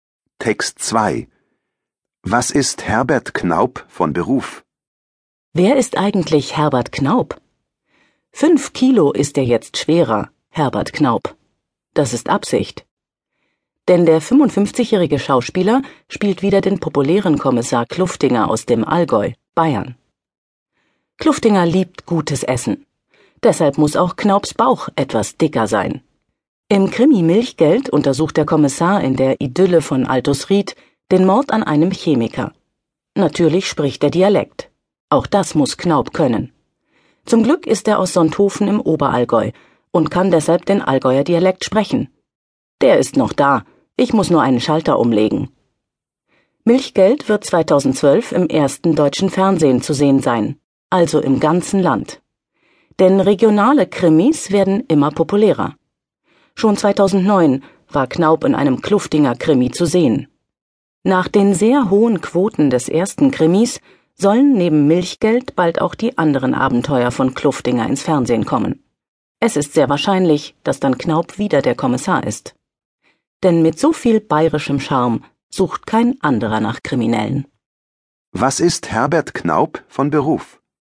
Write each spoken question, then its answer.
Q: Was ist Herbert Knaub von Beruf?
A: Herbert Knaub ist Schauspieler.